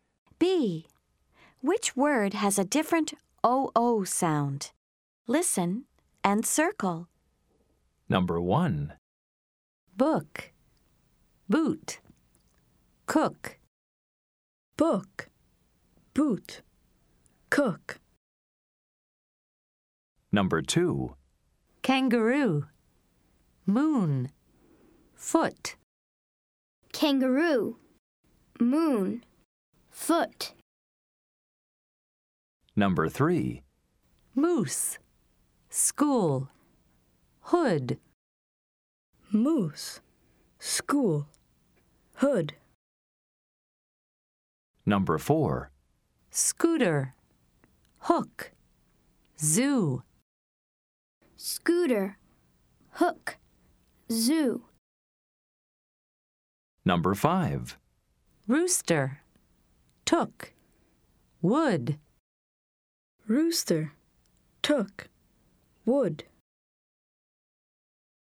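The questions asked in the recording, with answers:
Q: Which word has a different OO sound?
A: Boot

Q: Which word has a different OO sound?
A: Foot

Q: Which word has a different OO sound?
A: Hood

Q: Which word has a different OO sound?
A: Hook

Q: Which word has a different OO sound?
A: Rooster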